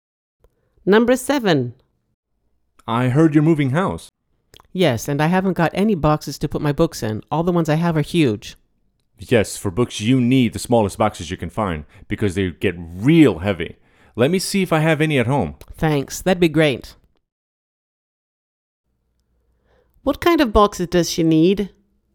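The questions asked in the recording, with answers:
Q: What kind of boxes does she need?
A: Small boxes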